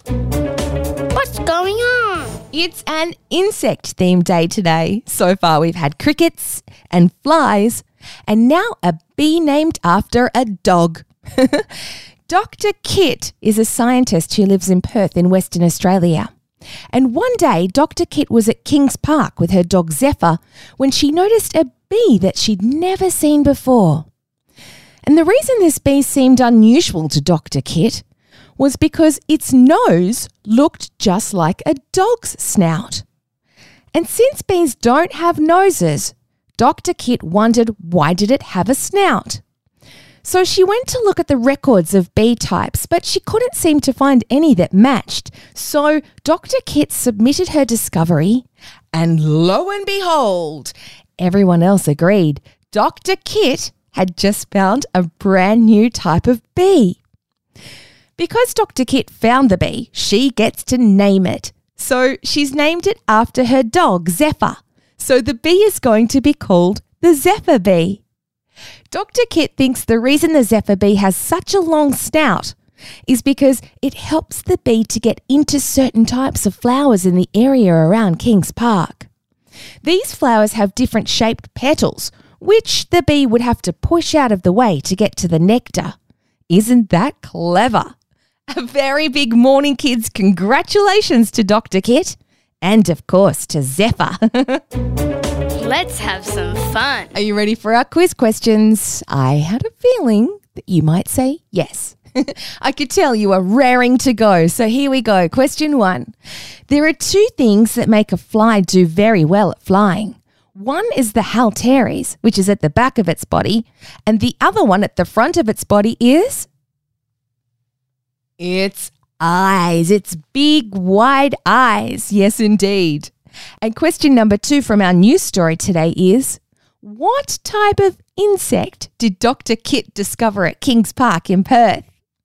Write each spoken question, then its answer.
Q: What type of insect did Dr. Kit discover at Kings Park in Perth?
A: You're right, it's a bee, or a zephyr bee to be exact.